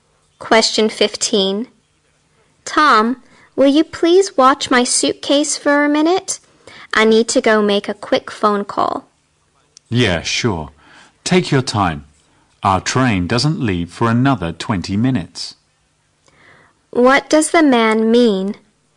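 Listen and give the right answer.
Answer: He'll watch her suitcase; there is plenty of time before the train leaves.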